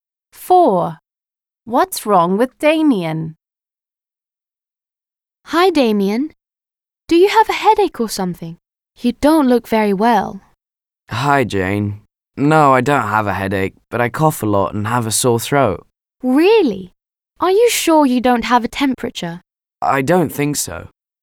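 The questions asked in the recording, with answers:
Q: What's wrong with Damien?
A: He has a cough and a sore throat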